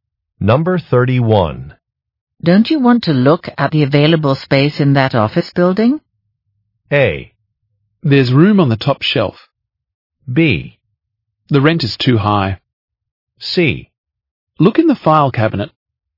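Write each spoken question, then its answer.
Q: Don't you want to look at the available space in that office building?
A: B: The rent is too high.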